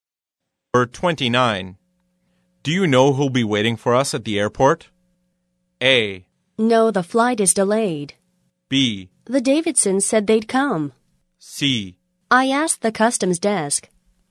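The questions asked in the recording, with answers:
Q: Do you know who'll be waiting for us at the airport?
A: B: The Davidsons said they'd come.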